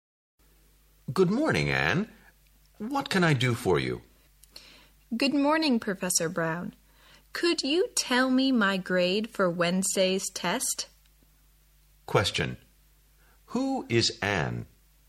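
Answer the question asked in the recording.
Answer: A student (of Professor Brown)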